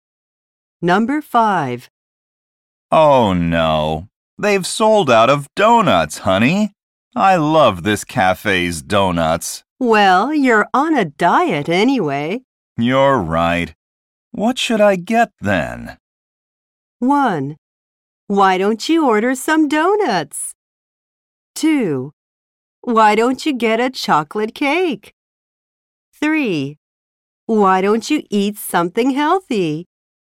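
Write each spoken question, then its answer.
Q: You're right. What should I get then?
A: 3: Why don't you eat something healthy?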